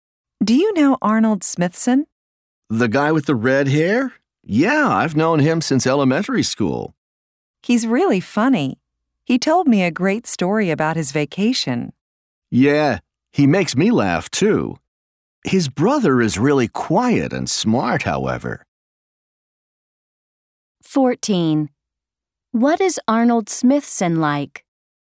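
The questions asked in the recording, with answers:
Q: What is Arnold Smithson like?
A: He is funny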